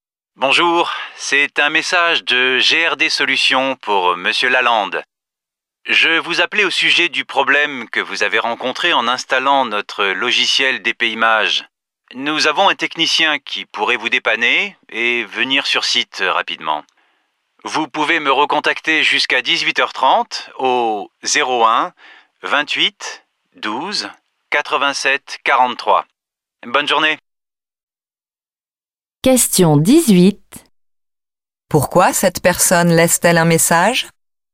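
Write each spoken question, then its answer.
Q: Pourquoi cette personne laisse-t-elle un message?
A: Pour proposer l'intervention d'un technicien pour le problème d'installation du logiciel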